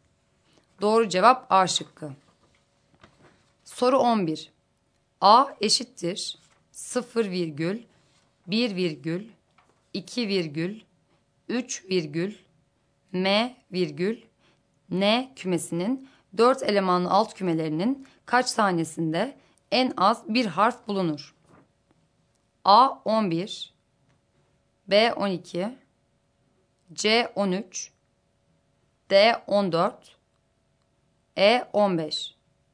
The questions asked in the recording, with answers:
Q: A eşittir 0 virgül, 1 virgül, 2 virgül, 3 virgül, M virgül, N kümesinin 4 elemanlı alt kümelerinin kaç tanesinde en az bir harf bulunur?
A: Doğru cevap D şıkkı.